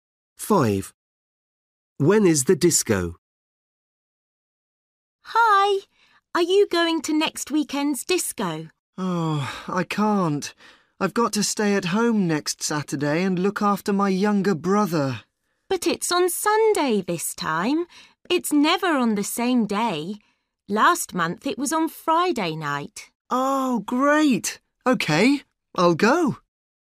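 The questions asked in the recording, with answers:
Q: When is the disco?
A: next Sunday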